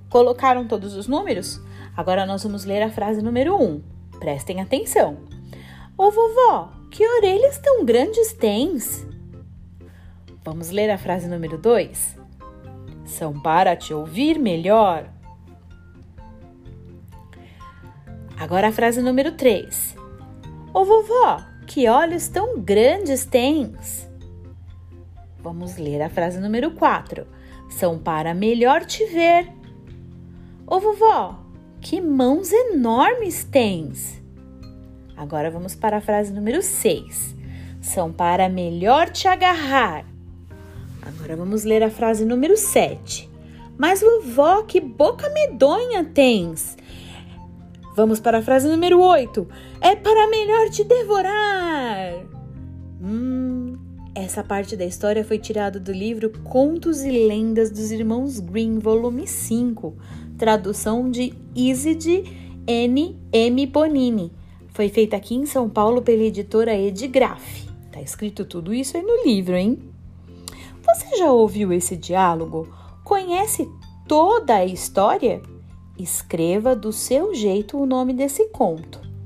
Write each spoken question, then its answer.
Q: Conhece toda a história? Escreva do seu jeito o nome desse conto.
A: Circule as personagens que fazem parte da história do Chapeuzinho Vermelho.